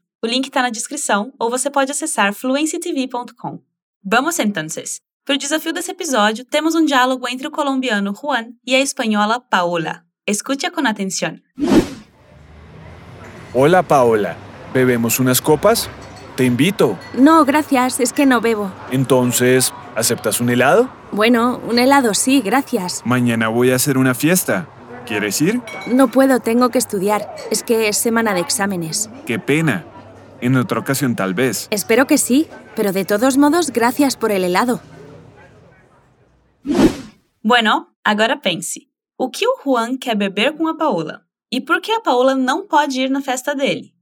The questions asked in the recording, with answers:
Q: ¿Y e por qué a Paola no puede ir na festa dele?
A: Ou seja, ela não pode porque tem que estudar, já que é semana de prova.